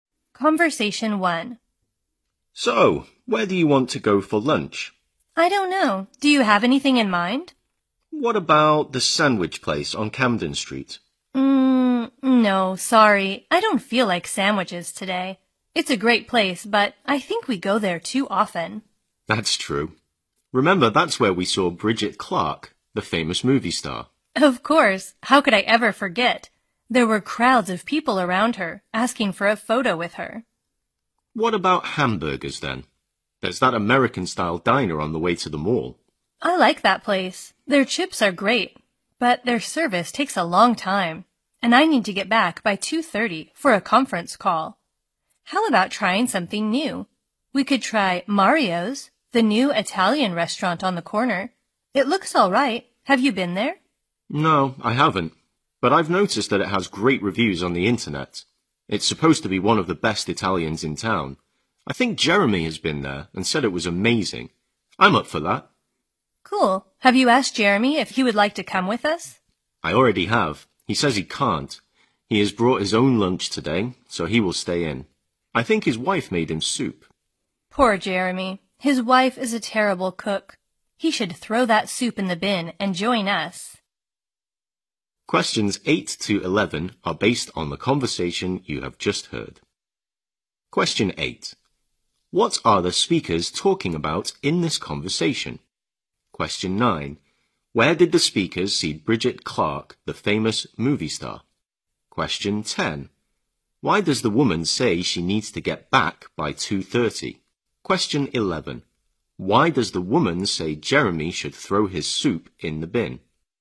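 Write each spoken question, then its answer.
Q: What are the speakers talking about in this conversation?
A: Where to go for lunch

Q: Where did the speakers see Bridget Clark, the famous movie star?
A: At the sandwich place on Camden Street

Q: Why does the woman say she needs to get back by 2:30?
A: She has a conference call

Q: Why does the woman say Jeremy should throw his soup in the bin?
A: His wife is a terrible cook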